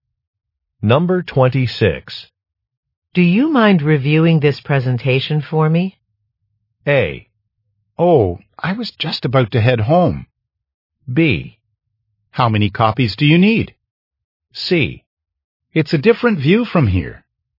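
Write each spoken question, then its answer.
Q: Do you mind reviewing this presentation for me?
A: A: Oh, I was just about to head home.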